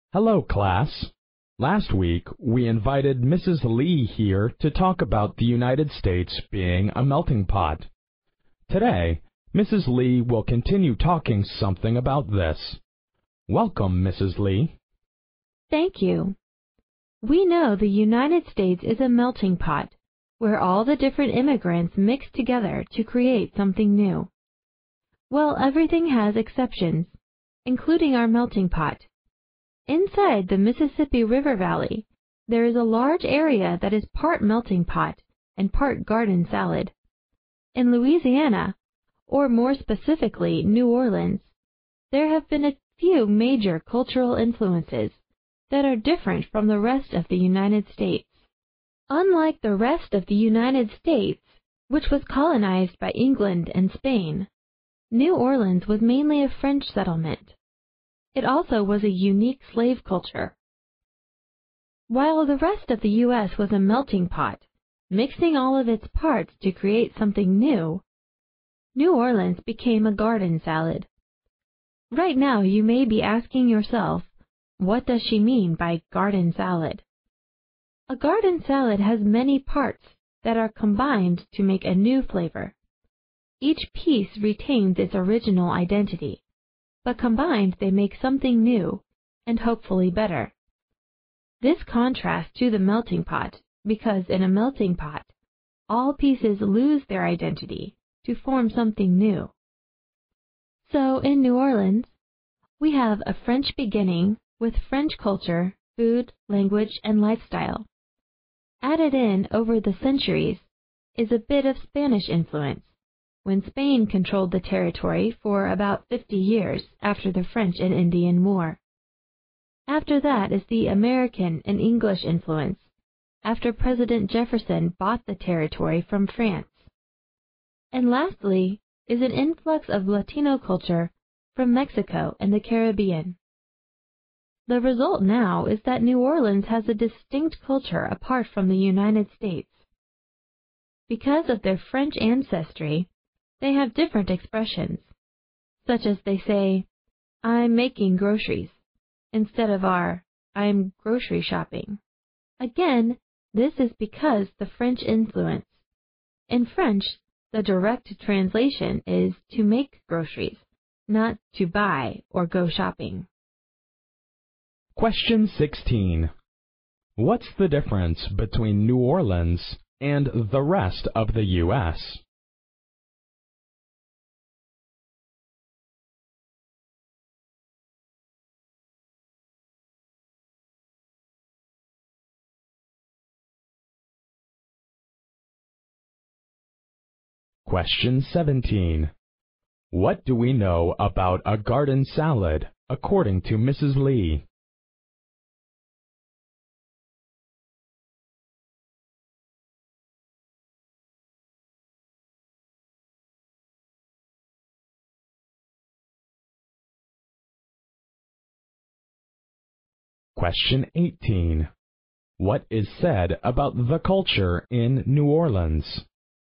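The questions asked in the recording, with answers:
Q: What do we know about a garden salad, according to Mrs. Lee?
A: Each piece keeps its original identity, but combined they make something new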